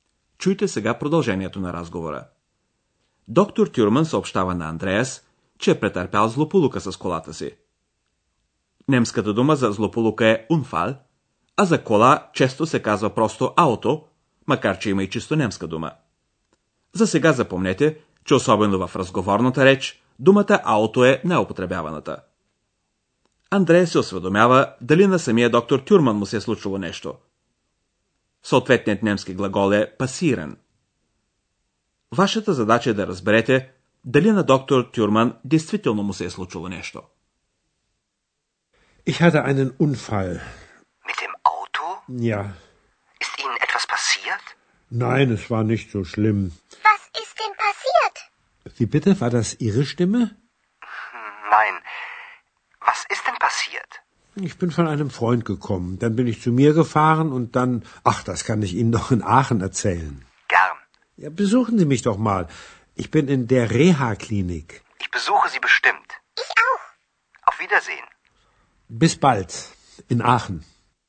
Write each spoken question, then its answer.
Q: Вашата задача е да разберете дали на доктор Тюрман действително му се е случило нещо.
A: Е, поне на доктор Тюрман не се е случило нищо страшно.